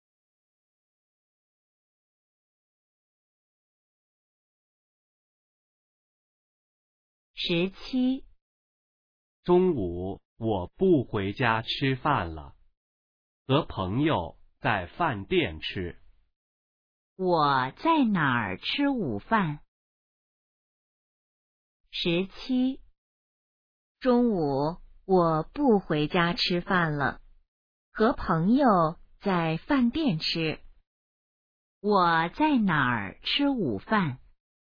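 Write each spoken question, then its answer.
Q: 我在哪儿吃午饭?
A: 饭店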